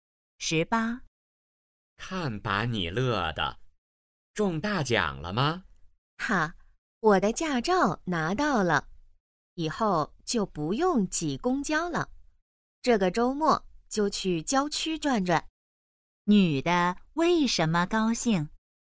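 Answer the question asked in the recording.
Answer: 拿到驾照了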